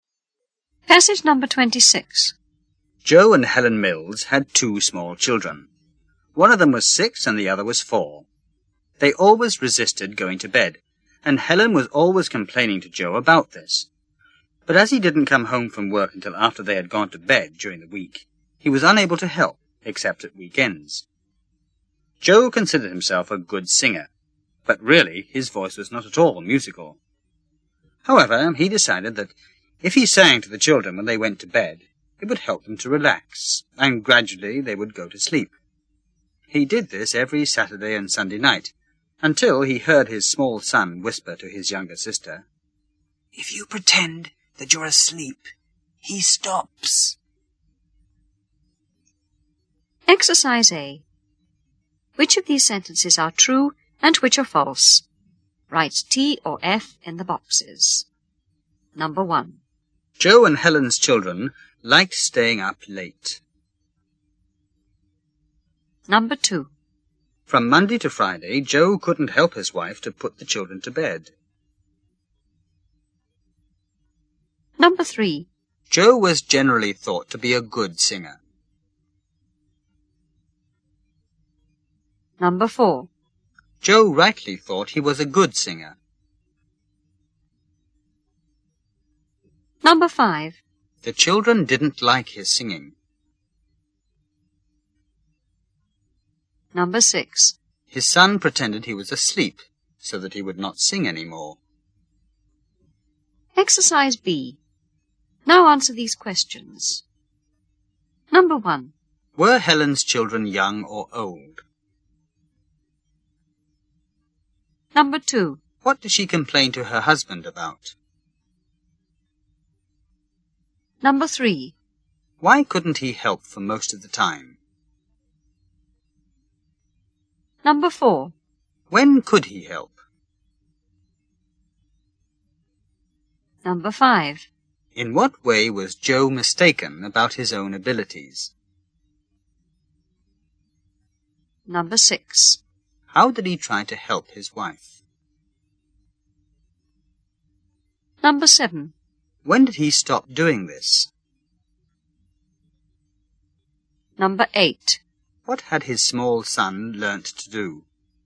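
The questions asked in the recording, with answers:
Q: Were Helen's children young or old?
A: Young

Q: What did she complain to her husband about?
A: The children always resisted going to bed

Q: Why couldn't he help for most of the time?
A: He didn't come home from work until after they had gone to bed during the week

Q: When could he help?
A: At weekends

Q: In what way was Joe mistaken about his own abilities?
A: He thought he was a good singer, but his voice was not musical

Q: How did he try to help his wife?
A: He sang to the children when they went to bed

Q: When did he stop doing this?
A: When he heard his son whisper to his sister that if you pretend to be asleep, he stops

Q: What had his small son learnt to do?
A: To pretend to be asleep so his father would stop singing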